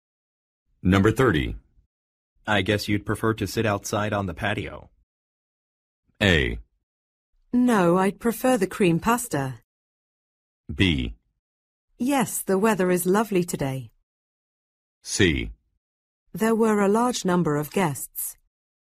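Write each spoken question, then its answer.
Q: I guess you'd prefer to sit outside on the patio.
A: B: Yes, the weather is lovely today.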